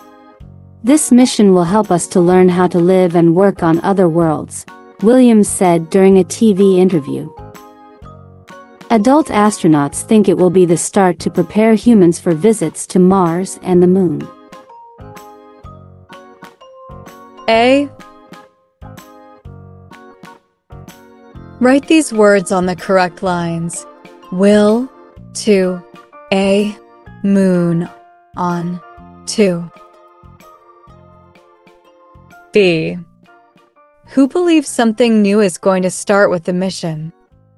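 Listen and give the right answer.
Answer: Adult astronauts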